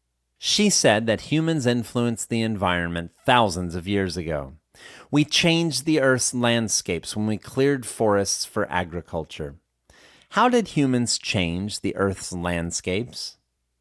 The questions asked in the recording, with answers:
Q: How did humans change the Earth's landscapes?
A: Humans changed the Earth's landscapes when we cleared the forests.